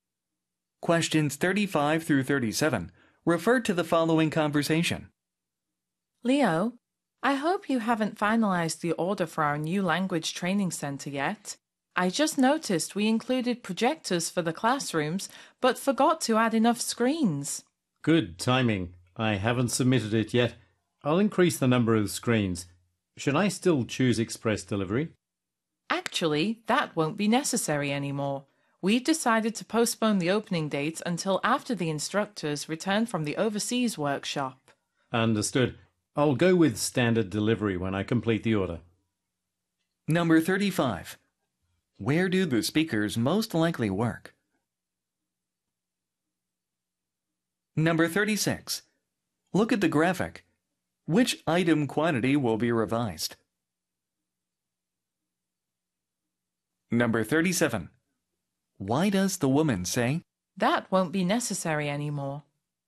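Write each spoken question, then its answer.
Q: Where do the speakers most likely work?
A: At a language training center

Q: Why does the woman say,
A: Express delivery isn't needed because the opening has been postponed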